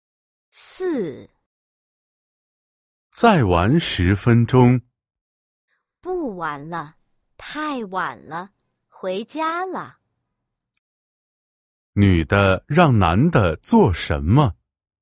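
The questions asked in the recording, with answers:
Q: 女的让男的做什么?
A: 回家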